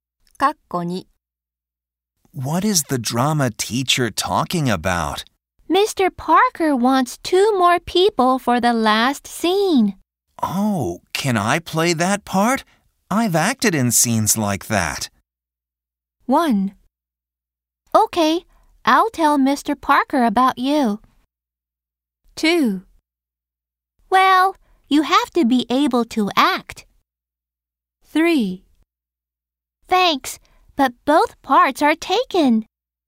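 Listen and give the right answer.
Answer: 1: Okay, I'll tell Mr. Parker about you.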